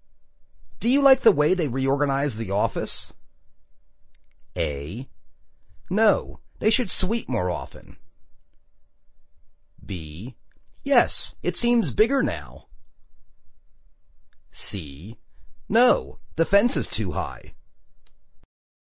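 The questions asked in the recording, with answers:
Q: Do you like the way they reorganize the office?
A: B: Yes, it seems bigger now.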